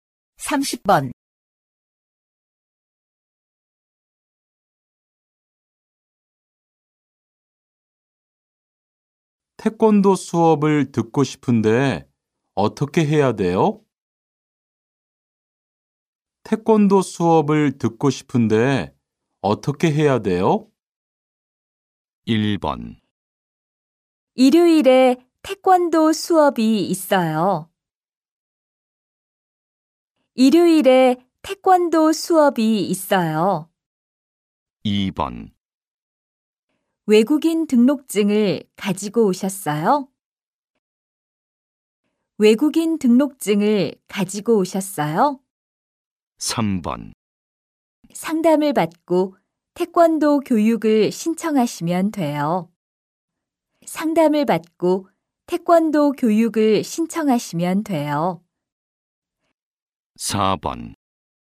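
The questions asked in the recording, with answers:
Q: 태권도 수업을 듣고 싶은데 어떻게 해야 돼요?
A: 3: 상담을 받고 태권도 교육을 신청하시면 돼요.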